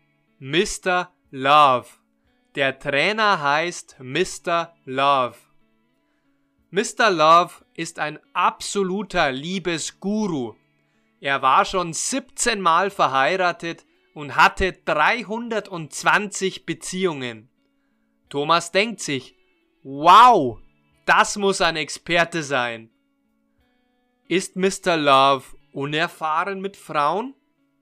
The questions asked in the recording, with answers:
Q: Ist Mr. Love unerfahren mit Frauen?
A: Nein, er ist nicht unerfahren mit Frauen.